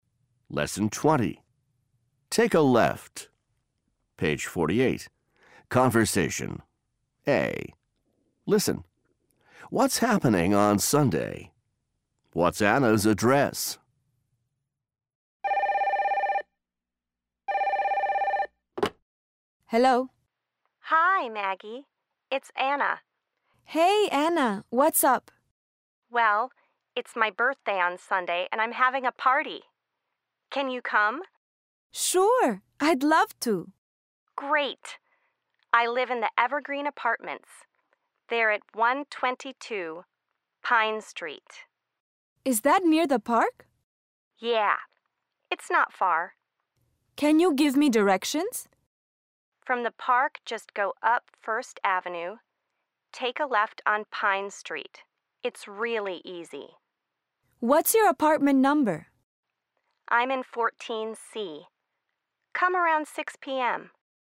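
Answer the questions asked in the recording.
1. Anna's birthday party
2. 122 Pine Street, Evergreen Apartments, 14C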